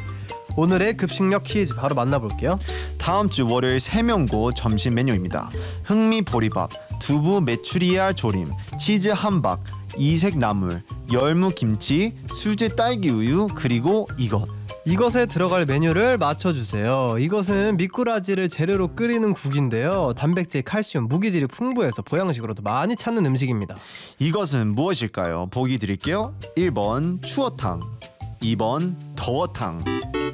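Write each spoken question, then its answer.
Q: 이것은 무엇일까요? 보기 드릴게요. 1번 추어탕, 2번 더워탕.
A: 1: 추어탕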